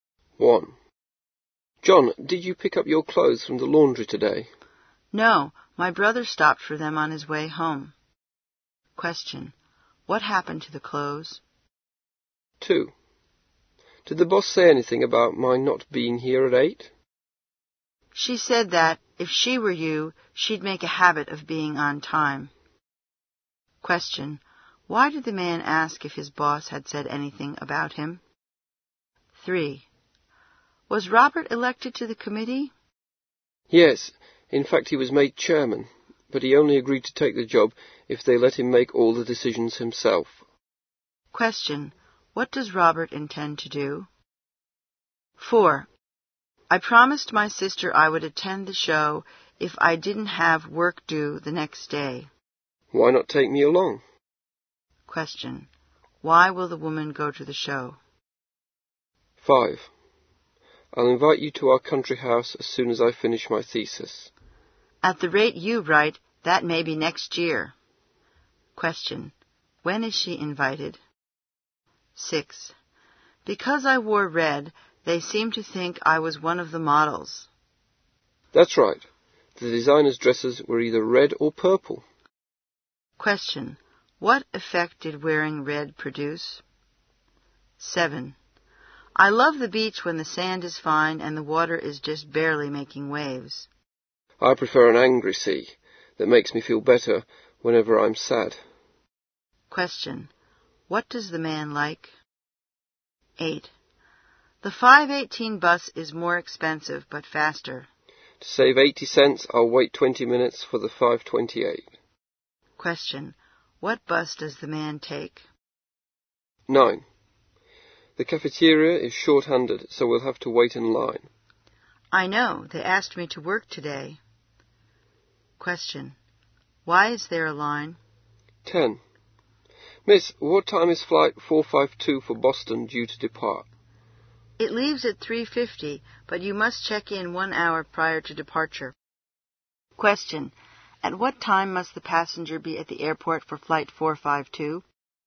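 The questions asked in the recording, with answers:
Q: What happened to the clothes?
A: John's brother picked them up from the laundry on his way home.

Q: Why did the man ask if his boss had said anything about him?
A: Because he wasn't at work at 8; he was late.

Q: What does Robert intend to do?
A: Make all the decisions himself as chairman.

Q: When is she invited?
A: When he finishes his thesis, which may not be until next year.

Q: What effect did wearing red produce?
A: People thought she was one of the models.

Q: What bus does the man take?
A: The 5:28 bus.

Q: Why is there a line?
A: The cafeteria is short of staff.

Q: At what time must the passenger be at the airport for flight 452?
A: By 2:50.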